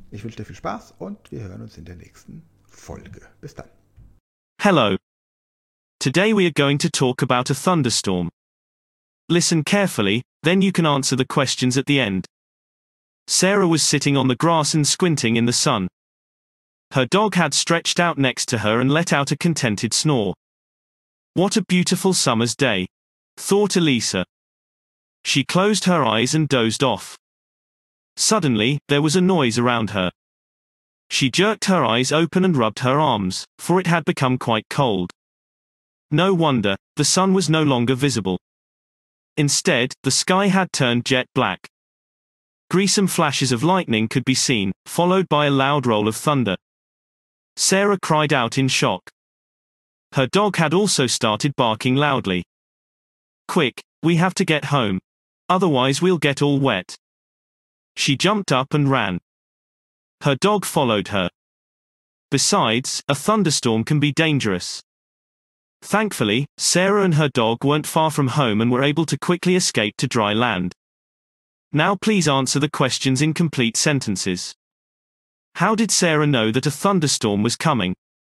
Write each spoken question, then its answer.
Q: How did Sarah know that a thunderstorm was coming?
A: she realized that a thunderstorm was coming because it suddenly became loud and cold around her.